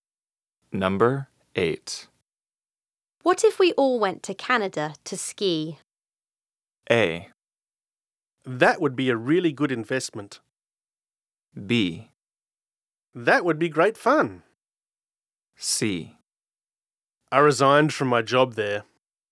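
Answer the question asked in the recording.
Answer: B: That would be great fun.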